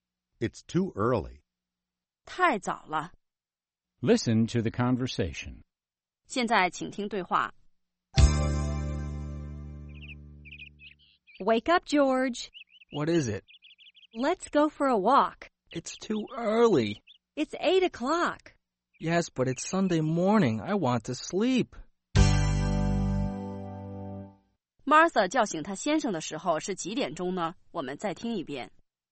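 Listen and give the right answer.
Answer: 八点钟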